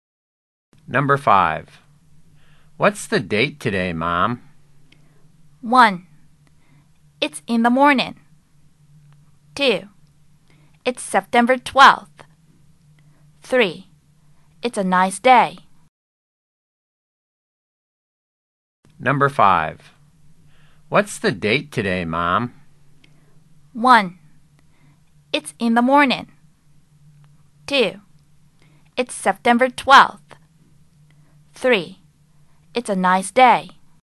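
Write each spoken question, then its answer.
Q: What's the date today, Mom?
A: 2: It's September 12th.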